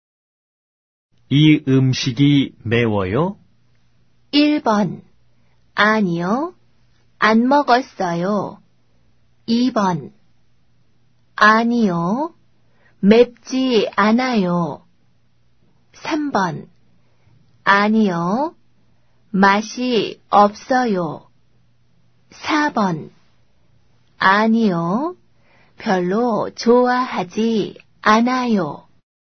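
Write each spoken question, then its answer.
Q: 이 음식이 매워요?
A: 2번: 아니요, 맵지 않아요.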